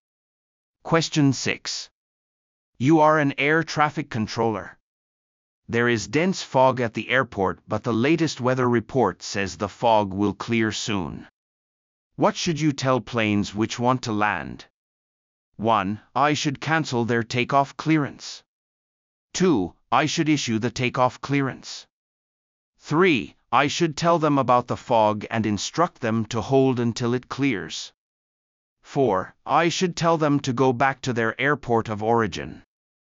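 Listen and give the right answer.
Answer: 3: I should tell them about the fog and instruct them to hold until it clears.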